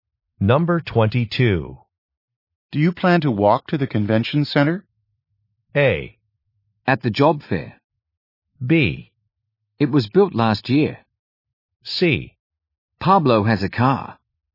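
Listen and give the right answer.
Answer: C: Pablo has a car.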